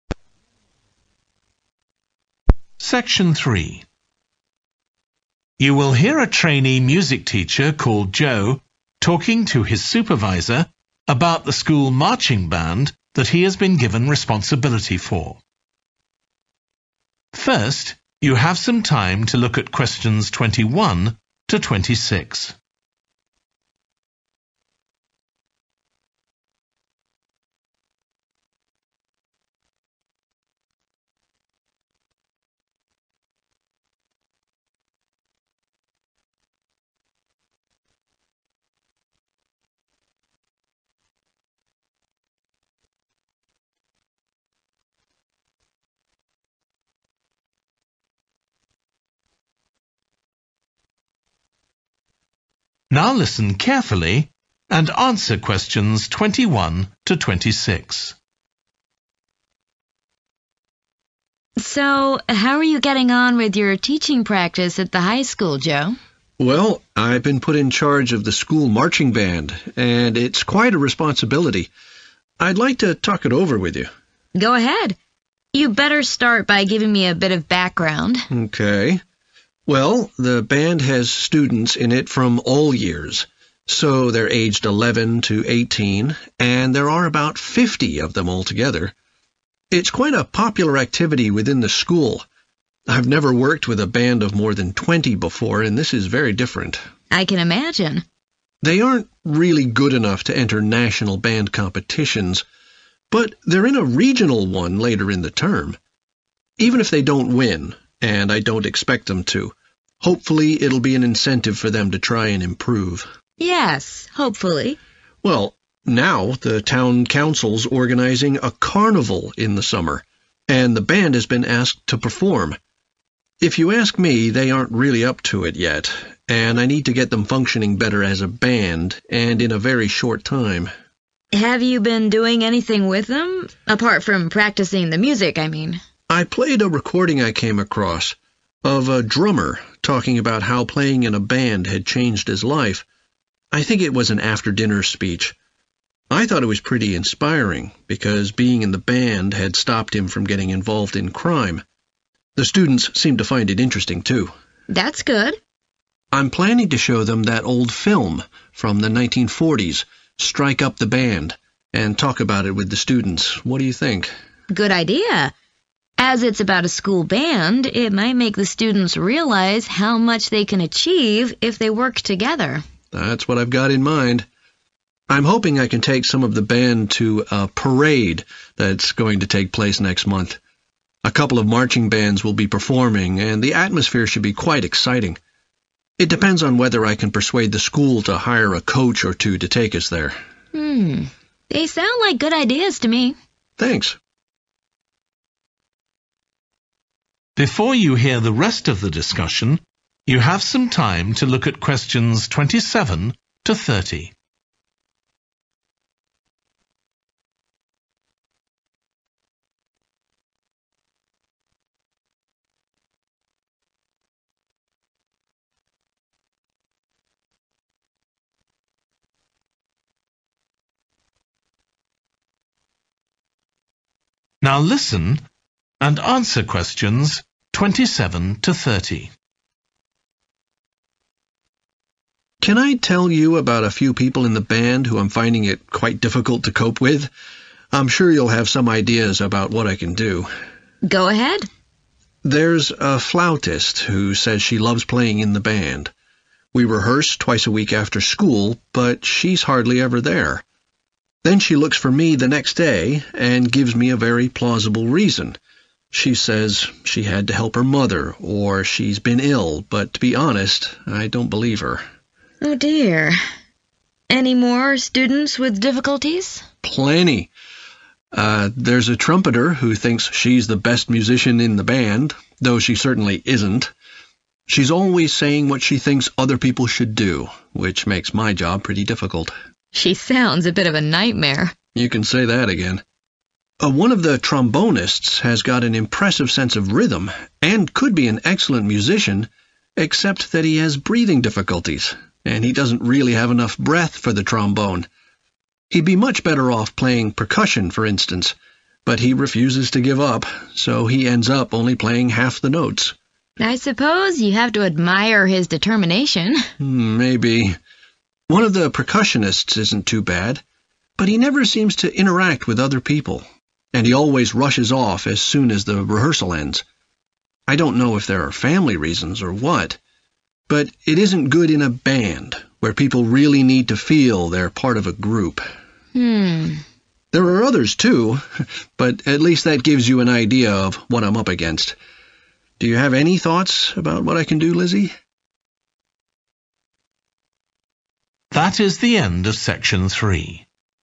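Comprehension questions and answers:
Complete the notes below. Write ONE WORD AND/OR A NUMBER for each answer.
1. It consists of around 11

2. It has been invited to play in the town's 13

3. They have listened to a talk by a 14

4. Joe will discuss a 15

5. with the band. Joe hopes the band will attend a 16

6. flautist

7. trumpeter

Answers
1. 50
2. carnival
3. drummer
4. film
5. parade
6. D. misses too many rehearsals
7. B. keeps making unhelpful suggestions

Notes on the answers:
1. Well the band has students in it from all years, so they're aged 11 to 18, and there are about 50 of them altogether [Chà, ban nhạc có sinh viên từ tất cả các năm, vì vậy họ ở độ tuổi từ 11 đến 18 và có khoảng 50 người tất cả].
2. Well, now the town council's organising a carnival in the summer, and the band has been asked to perform [Chà, bây giờ hội đồng thị trấn đang tổ chức lễ hội hóa trang mùa hè và ban nhạc đã được mời đến biểu diễn].
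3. I played a recording I came across, of a drummer talking about how playing in a band had changed his life [Tôi đã phát một đoạn ghi âm mà tôi tình cờ tìm thấy về một tay trống nói về việc chơi trong một ban nhạc đã thay đổi cuộc đời anh ấy như thế nào].
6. We rehearse twice a week after school, but she's hardly ever there (= misses too many rehearsals) [Chúng tôi luyện tập hai lần một tuần sau giờ học, nhưng cô ấy hiếm khi có mặt ở đó].
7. She's always saying what she thinks other people should do (= keeps making unhelpful suggestions), which makes my job pretty difficult [Cô ấy luôn nói về những gì cô ấy nghĩ người khác nên làm, điều này khiến công việc của tôi khá khó khăn].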